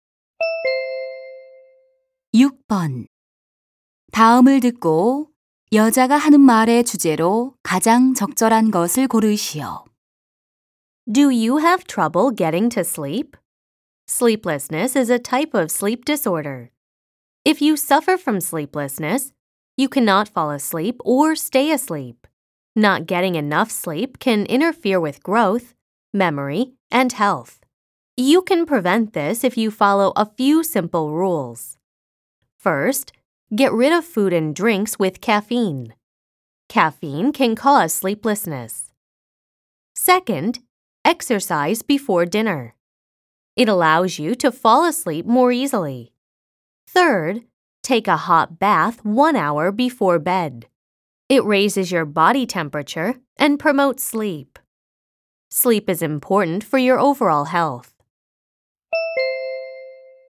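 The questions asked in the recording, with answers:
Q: 다음을 듣고 여자가 하는 말의 주제로 가장 적절한 것을 고르시오.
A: 불면증을 예방하는 방법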